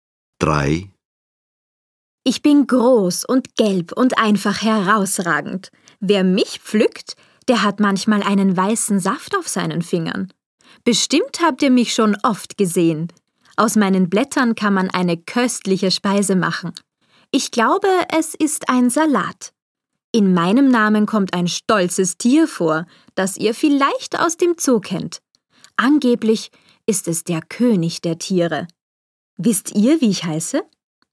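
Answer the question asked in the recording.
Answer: Löwenzahn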